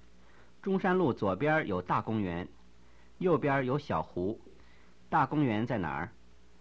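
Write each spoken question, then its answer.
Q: 大公园在哪儿?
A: 中山路左边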